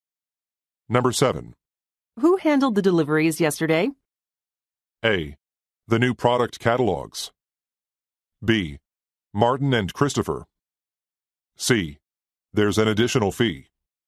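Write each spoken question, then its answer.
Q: Who handled the deliveries yesterday?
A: B: Martin and Christopher.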